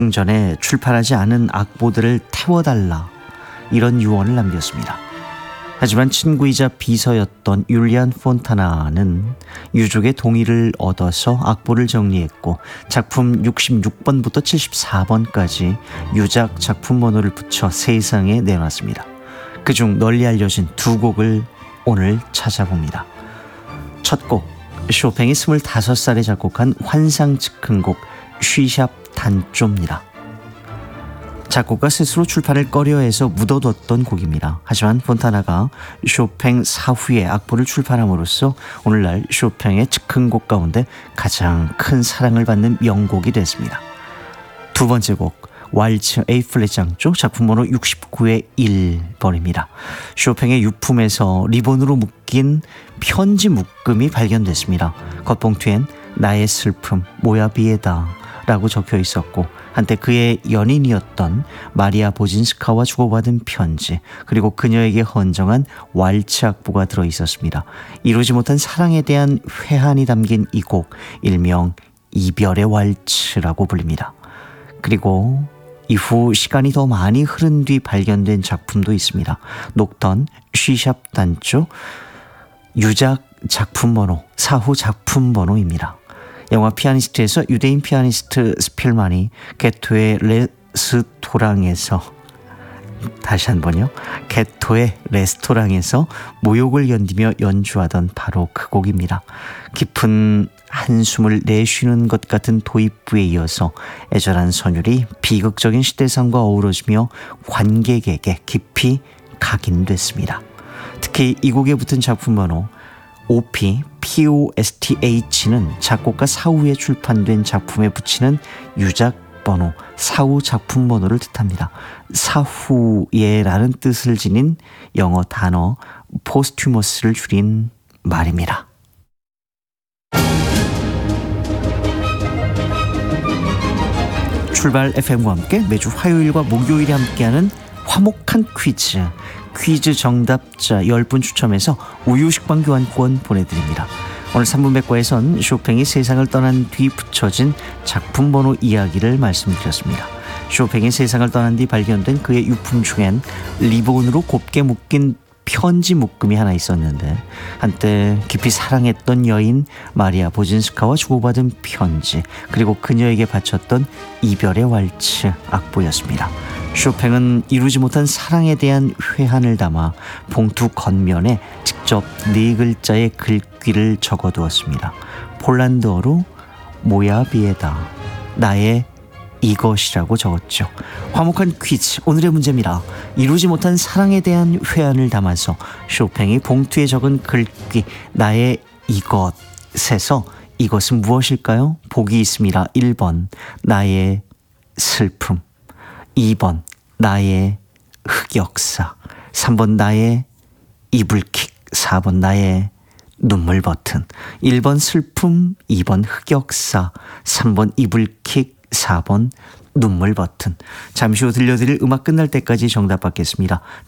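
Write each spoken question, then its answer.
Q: 이루지 못한 사랑에 대한 회한을 담아서 쇼팽이 봉투에 적은 글귀 나의 이것에서 이것은 무엇일까요?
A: 1번: 나의 슬픔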